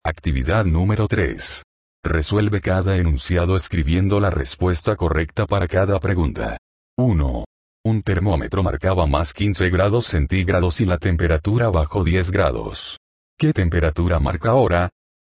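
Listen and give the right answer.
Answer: 5 grados centígrados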